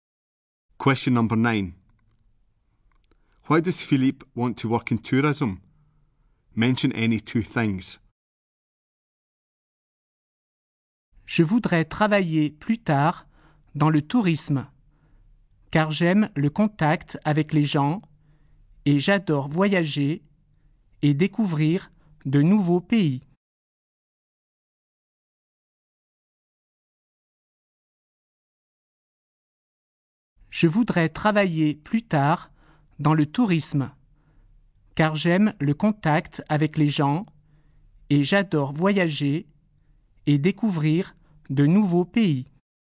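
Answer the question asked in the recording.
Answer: He likes contact with people and loves travelling and discovering new countries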